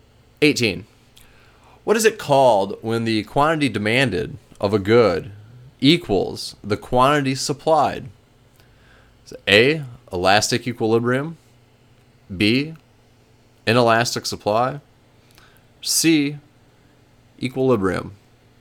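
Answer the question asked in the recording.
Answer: C: equilibrium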